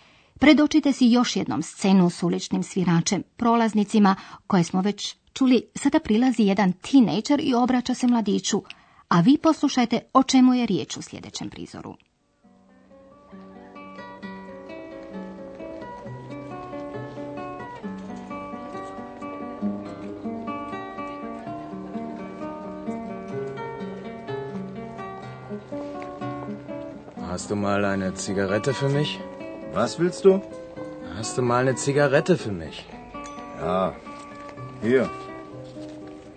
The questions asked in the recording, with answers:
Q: o čemu je riječ u sljedećem prizoru.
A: U ovome je prizoru ovaj traži tražio cigaretu i cigarete.